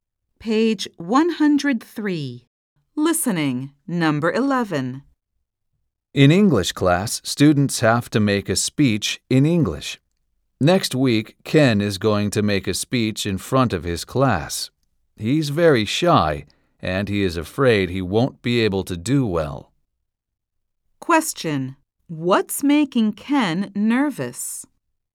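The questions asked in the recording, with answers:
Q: What's making Ken nervous?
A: Making a speech in English in front of his class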